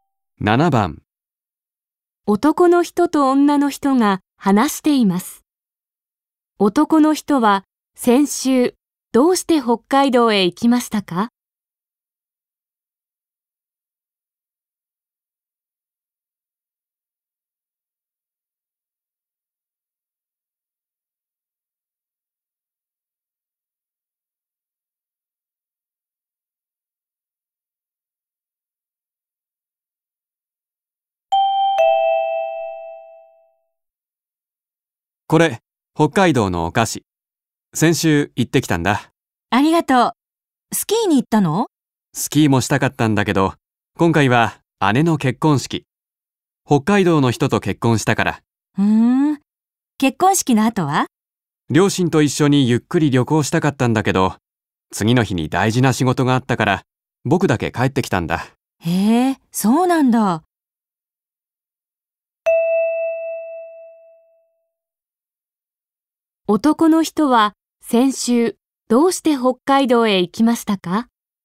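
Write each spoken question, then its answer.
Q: 男の人は先週どうして北海道へ行きましたか?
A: 姉の結婚式のため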